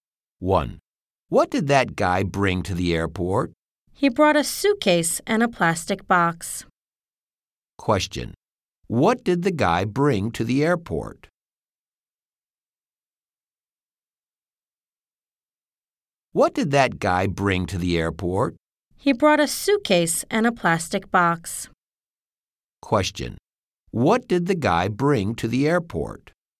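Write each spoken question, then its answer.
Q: Question, what did the guy bring to the airport?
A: A suitcase and a plastic box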